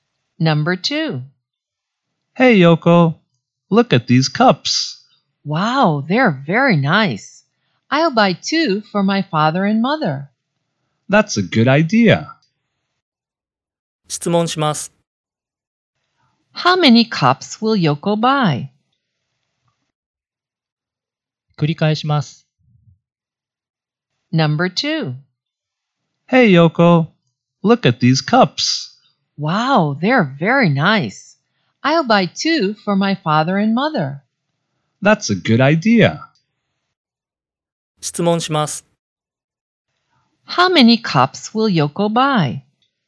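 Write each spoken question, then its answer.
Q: How many cups will Yoko buy?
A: Two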